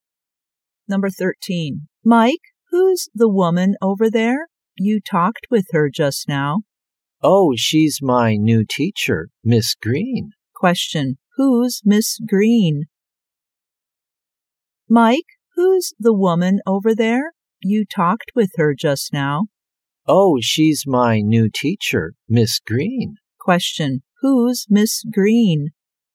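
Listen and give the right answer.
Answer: Mike's new teacher.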